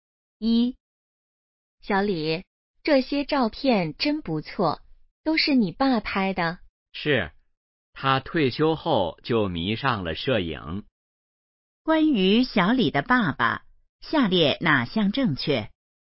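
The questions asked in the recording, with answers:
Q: 关于小李的爸爸,下列哪项正确?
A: 他退休后迷上了摄影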